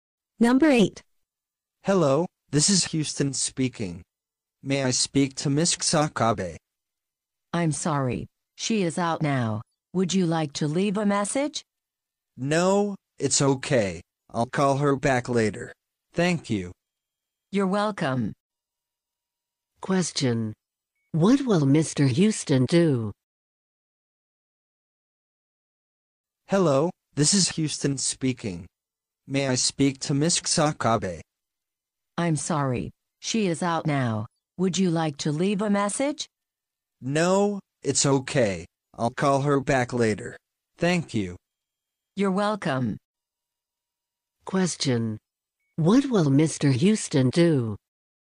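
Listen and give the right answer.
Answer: Call Miss Kusakabe back later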